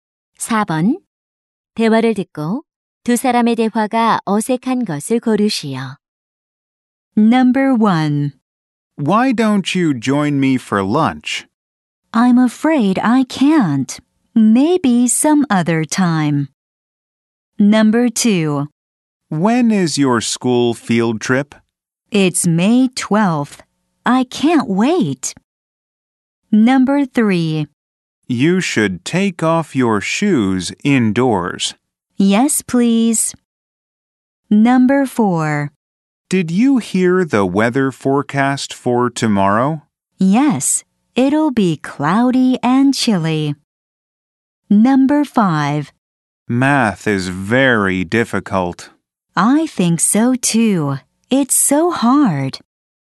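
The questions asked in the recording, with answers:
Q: 대화를 듣고 두 사람의 대화가 어색한 것을 고르시오.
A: 3: You should take off your shoes indoors. / Yes, please.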